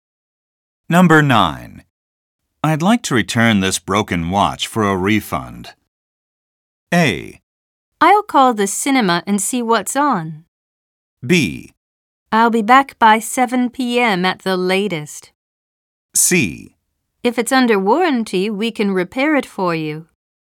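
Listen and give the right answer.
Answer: C: If it's under warranty, we can repair it for you.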